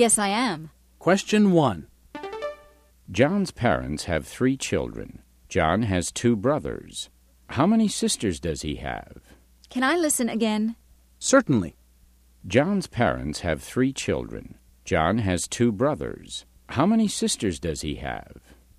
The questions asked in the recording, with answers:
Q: John's parents have 3 children. John has 2 brothers. How many sisters does he have?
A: The answer is, he doesn't have any sisters.